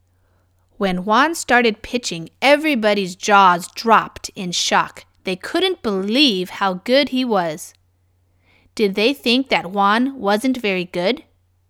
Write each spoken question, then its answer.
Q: Did they think that Juan wasn't very good?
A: No, they didn't think that.